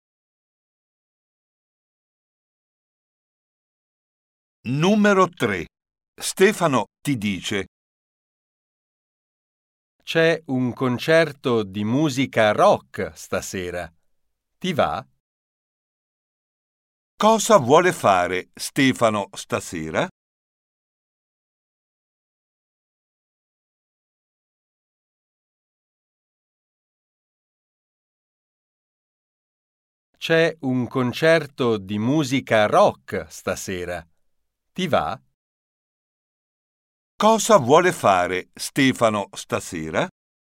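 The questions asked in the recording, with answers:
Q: Cosa vuole fare Stefano stasera?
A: andare a un concerto di musica rock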